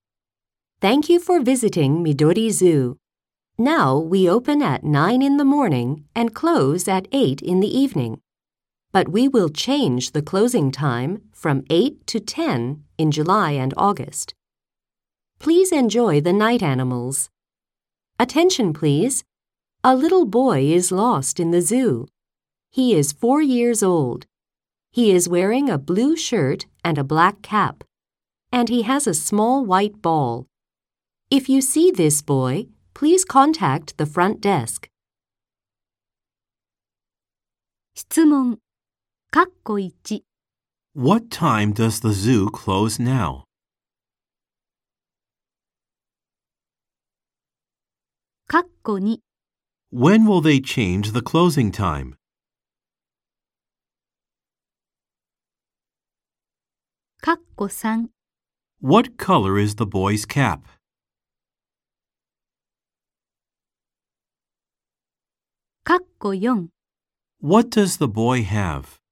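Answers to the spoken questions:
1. At 8 in the evening
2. In July and August
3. Black
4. A small white ball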